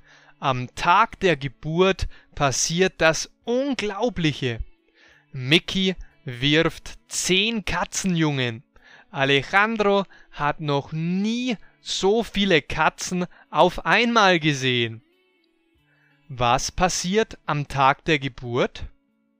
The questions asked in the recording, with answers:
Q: Was passiert am Tag der Geburt?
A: Das Unglaubliche. Mickey wirft 10 Katzenjungen.